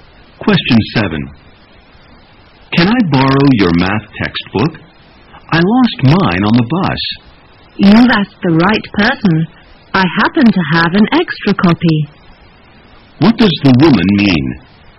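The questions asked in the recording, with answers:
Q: What does the woman mean?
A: She can lend him her extra copy of the math textbook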